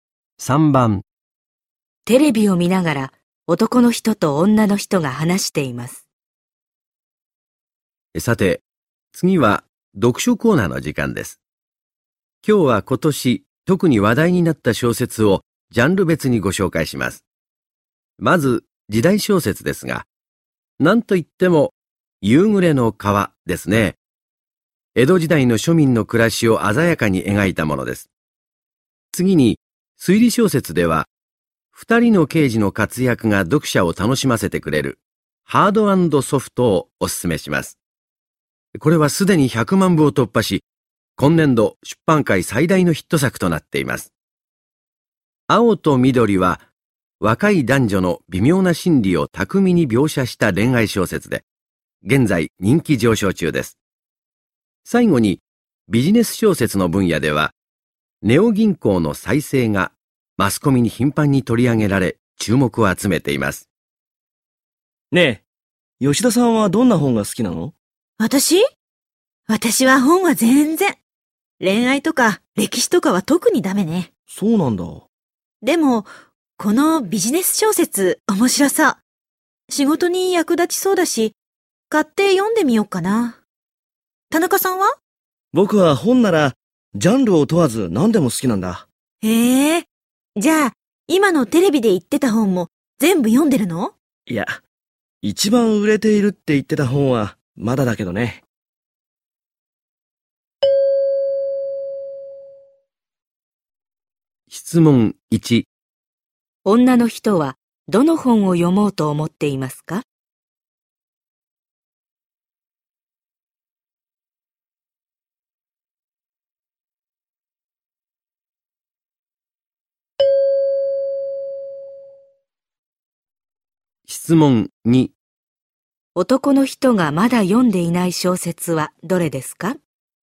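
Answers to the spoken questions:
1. ネオ銀行の再生
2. ハードソフト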